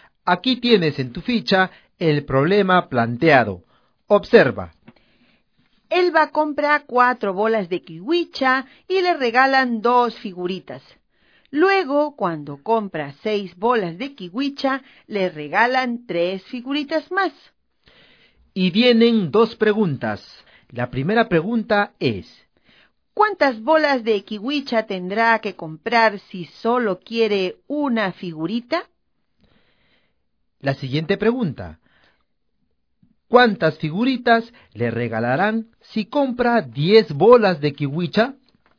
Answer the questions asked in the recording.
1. 2 bolas de kiwicha...
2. 5 figuras.